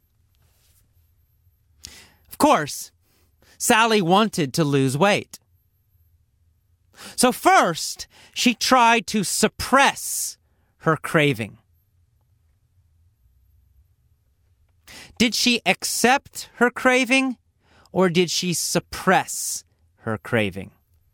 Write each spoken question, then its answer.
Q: Did she accept her craving, or did she suppress her craving?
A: Well, she tried to suppress it.